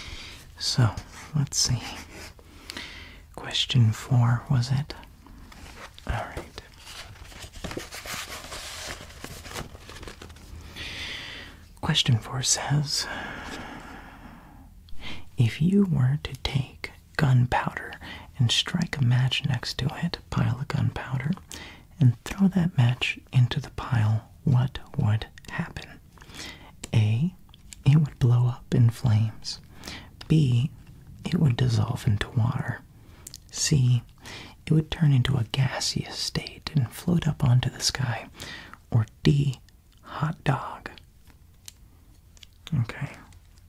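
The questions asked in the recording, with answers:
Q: if you were to take gunpowder and strike a match next to it, pile of gunpowder, and throw that match into the pile, what would happen?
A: A: it would blow up in flames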